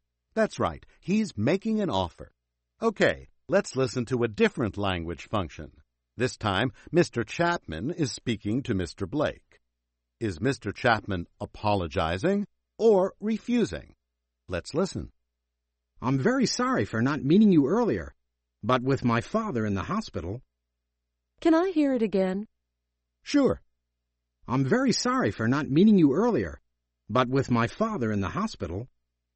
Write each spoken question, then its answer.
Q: Is Mr. Chapman apologizing or refusing?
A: That's right. He's making an apology.